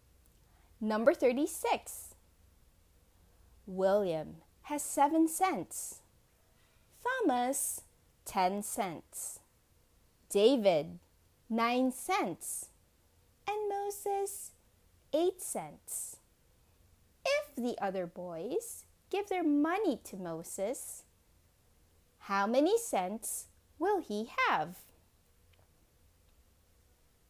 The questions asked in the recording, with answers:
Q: If the other boys give their money to Moses, how many cents will he have?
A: The answer is Moses will have 34 cents.